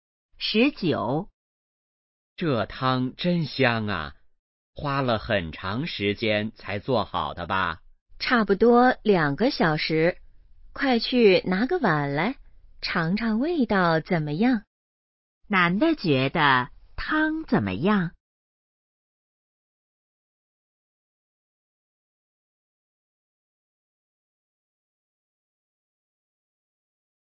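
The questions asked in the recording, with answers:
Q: 男的觉得汤怎么样?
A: 很香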